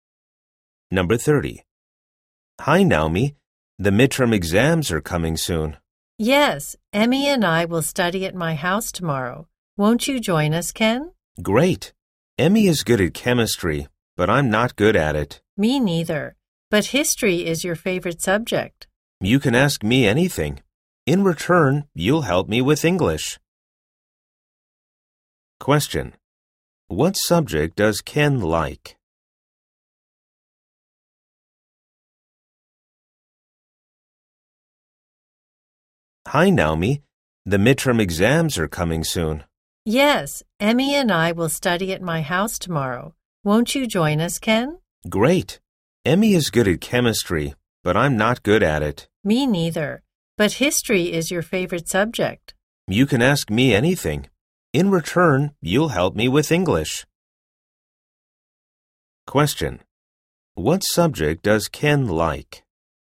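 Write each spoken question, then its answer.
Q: What subject does Ken like?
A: History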